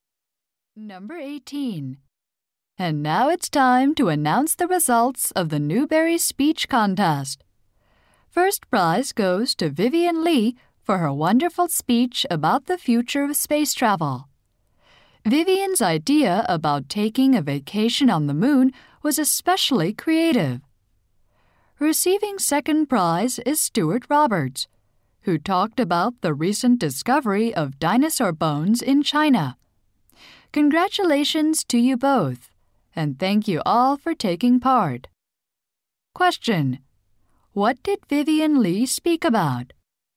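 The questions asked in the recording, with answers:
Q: What did Vivian Lee speak about?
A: The future of space travel.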